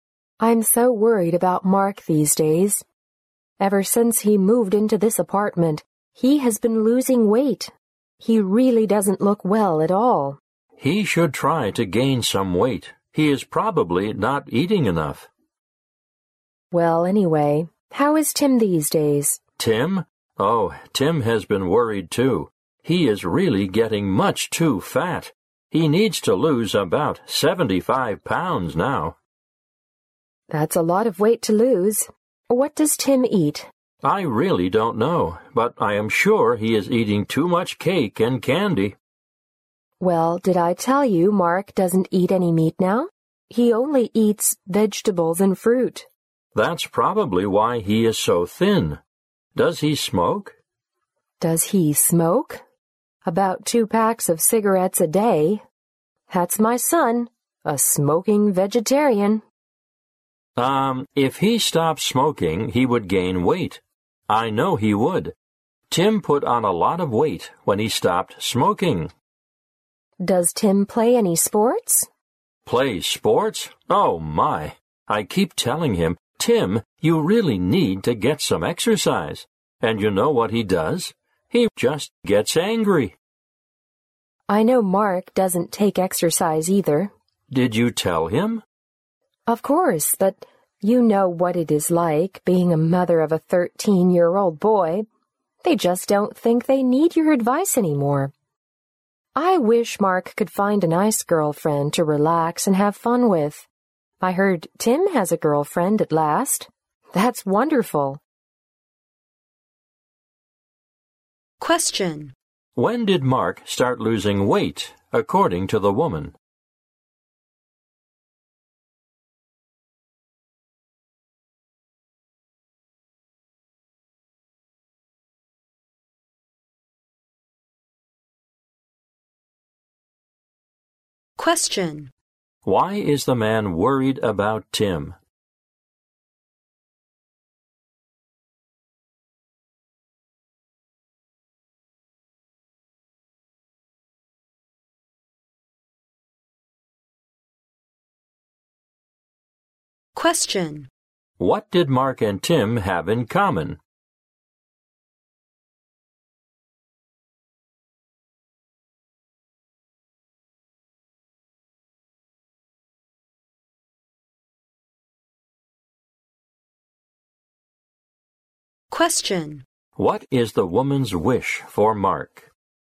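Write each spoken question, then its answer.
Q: When did Mark start losing weight, according to the woman?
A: Ever since he moved into his apartment

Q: Why is the man worried about Tim?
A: He is much too fat

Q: What is the woman's wish for Mark?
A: That he finds a nice girlfriend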